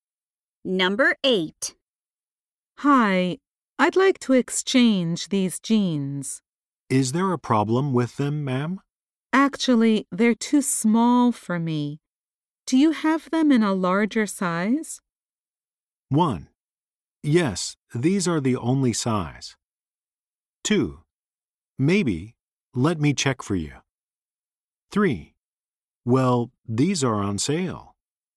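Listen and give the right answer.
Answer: 2: Maybe, let me check for you.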